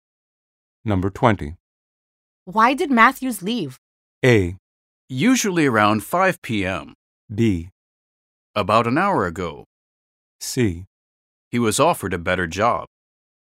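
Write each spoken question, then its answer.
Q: Why did Matthews leave?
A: C: He was offered a better job.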